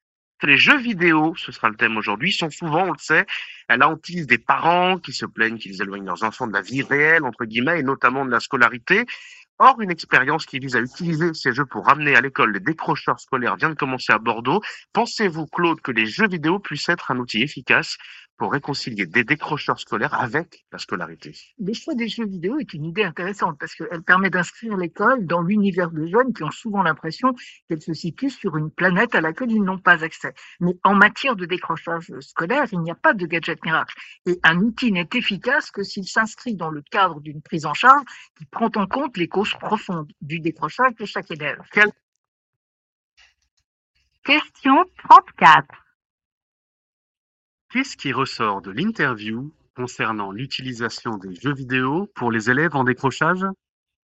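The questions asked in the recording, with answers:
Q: Qu'est-ce qui ressort de l'interview concernant l'utilisation des jeux vidéo pour les élèves en décrochage?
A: C'est une idée intéressante, mais ce n'est pas une solution miracle : ils ne sont efficaces que dans une prise en charge qui traite les causes profondes du décrochage.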